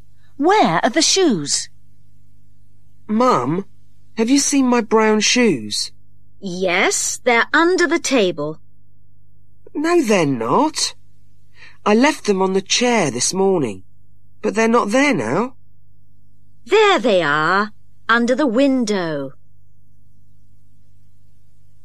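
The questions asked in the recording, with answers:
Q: Where are the shoes?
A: under the window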